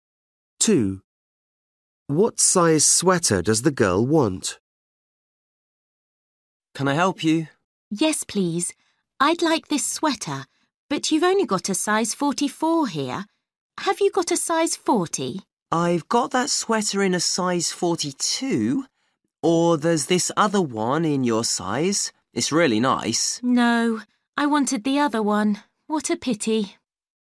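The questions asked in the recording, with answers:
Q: What size sweater does the girl want?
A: Size 40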